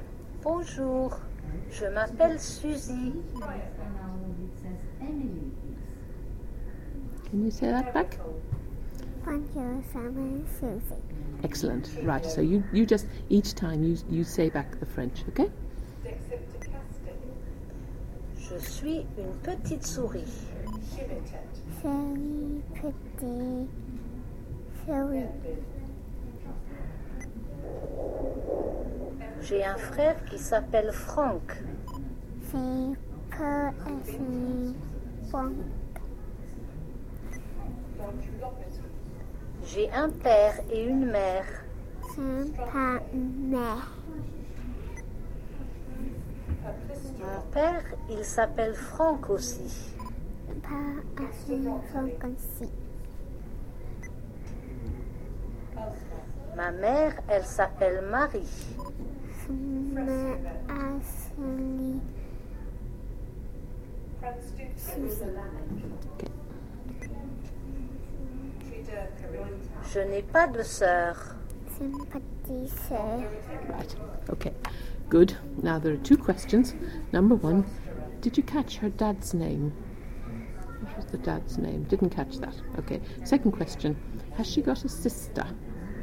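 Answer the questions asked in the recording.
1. Franck
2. No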